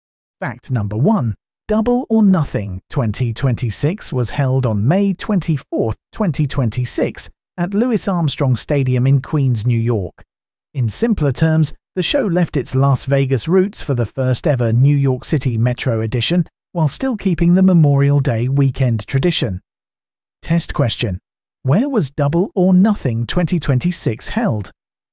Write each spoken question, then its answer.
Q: Where was Double or Nothing 2026 held?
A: Louis Armstrong Stadium in Queens, New York.